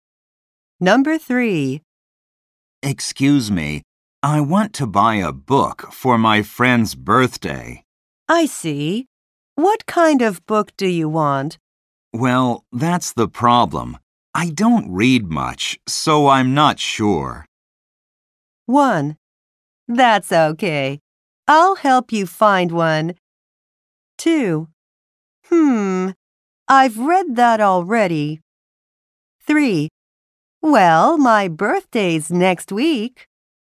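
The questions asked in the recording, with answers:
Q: I don't read much, so I'm not sure.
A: 1: That's okay. I'll help you find one.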